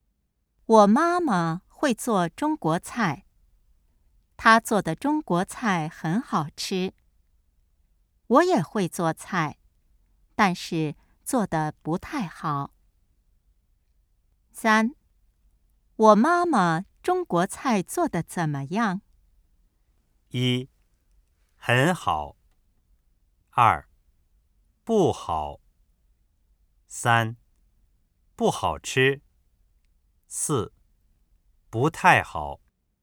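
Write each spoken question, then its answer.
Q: 我妈妈中国菜做得怎么样?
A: 一:很好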